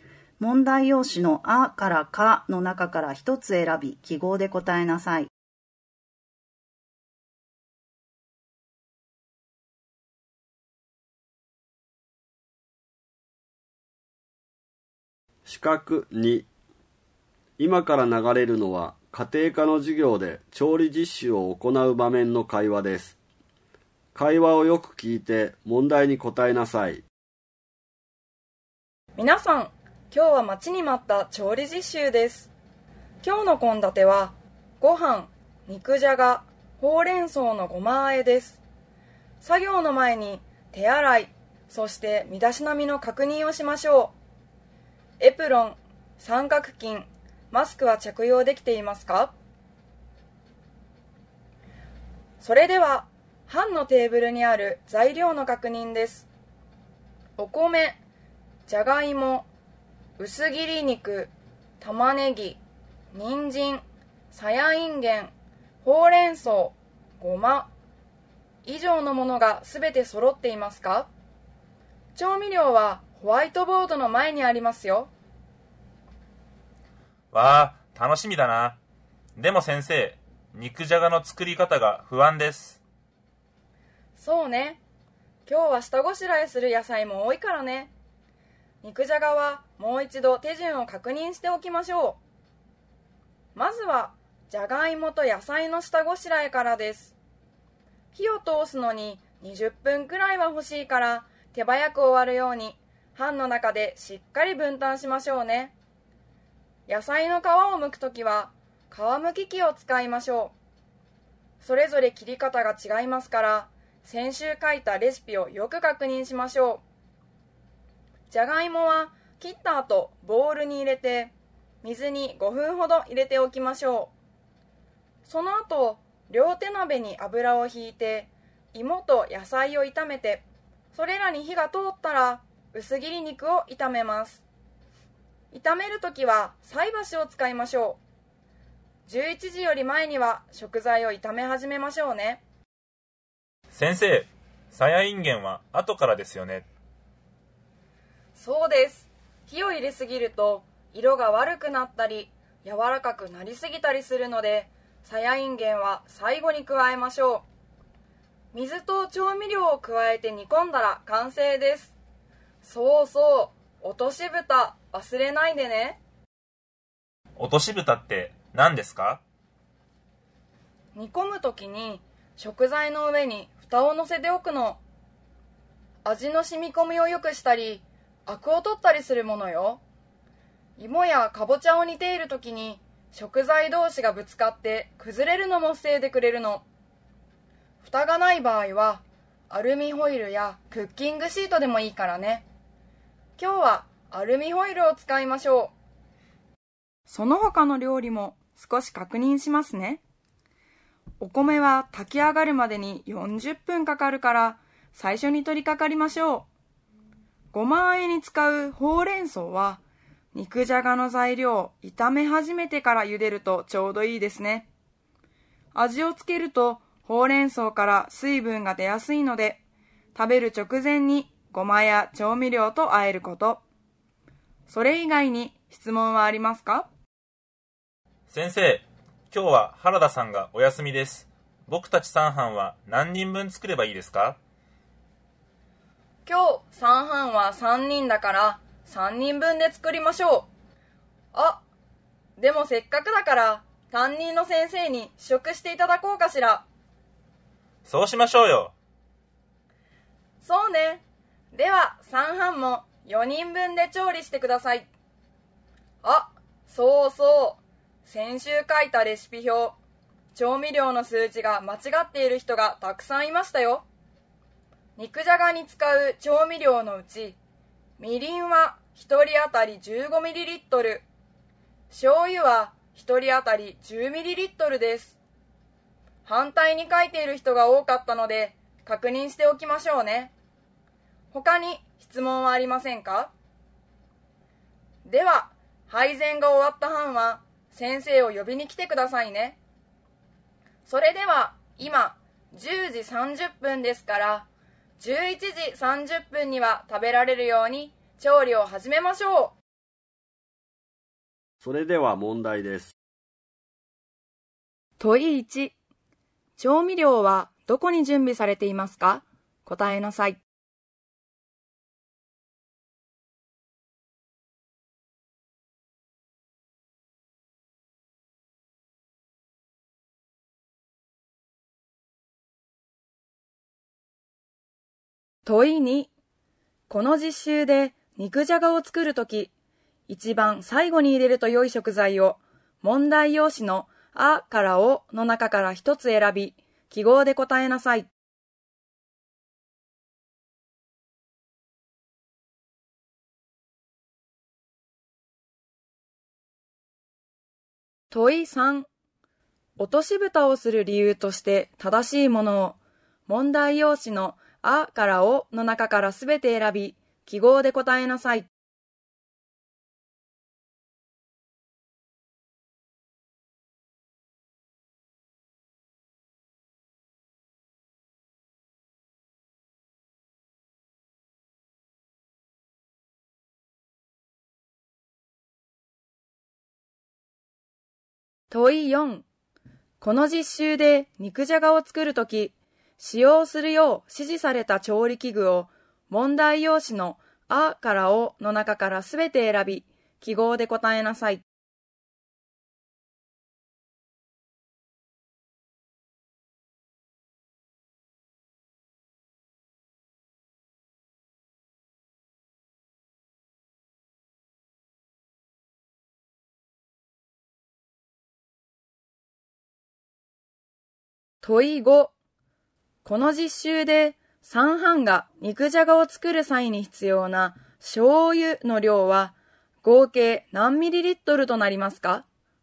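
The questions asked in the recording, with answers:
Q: 調味料はどこに準備されていますか?答えなさい。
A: ホワイトボードの前

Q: この実習で三班が肉じゃがを作る際に必要な醤油の量は合計何ミリリットルとなりますか?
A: 40ミリリットル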